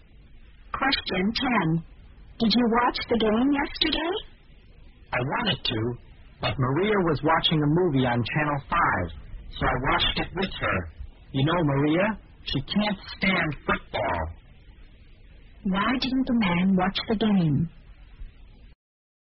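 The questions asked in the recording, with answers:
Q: Why didn't the man watch the game?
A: He watched a movie with Maria instead, because she can't stand football.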